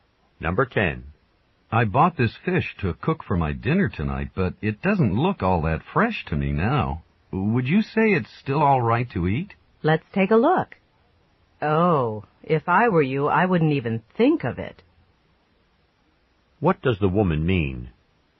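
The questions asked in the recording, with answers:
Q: What does the woman mean?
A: The fish shouldn't be eaten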